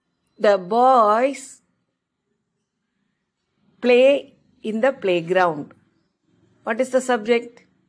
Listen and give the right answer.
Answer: The boys.